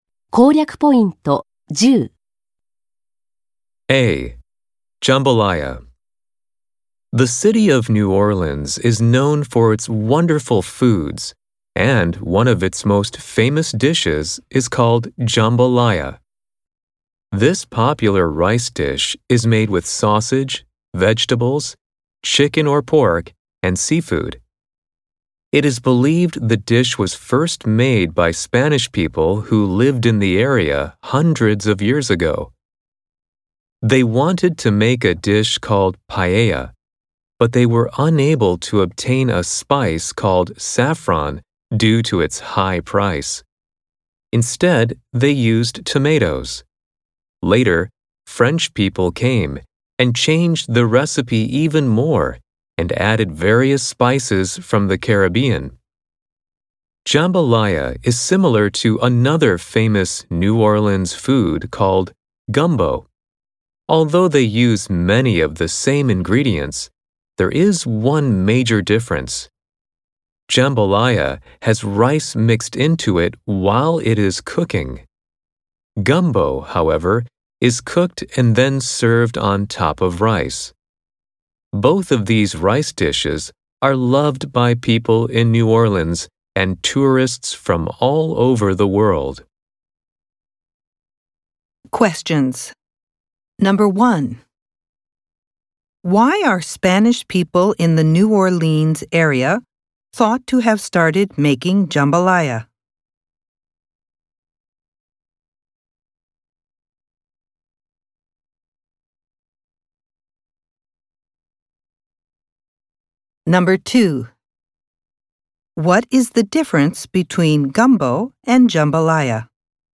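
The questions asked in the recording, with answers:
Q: Why are Spanish people in the New Orleans area thought to have started making jambalaya?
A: They couldn't get saffron for paella because it was too expensive, so they used tomatoes instead.

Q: What is the difference between gumbo and jambalaya?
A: Jambalaya has rice mixed in while cooking; gumbo is served on top of rice.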